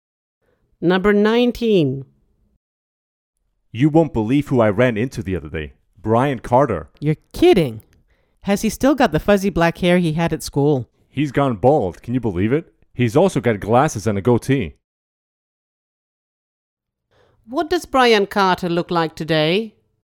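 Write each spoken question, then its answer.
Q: What does Brian Carter look like today?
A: bald, with glasses and a goatee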